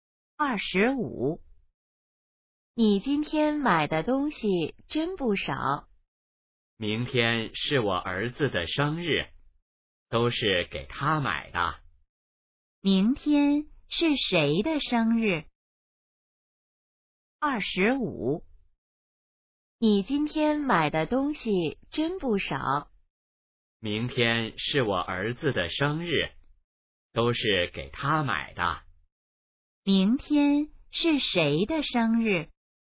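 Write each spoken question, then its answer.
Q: 明天是谁的生日?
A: 儿子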